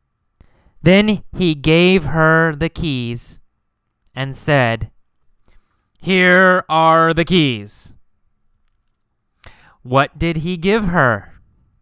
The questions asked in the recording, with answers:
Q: What did he give her?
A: The keys, right? The keys to his car.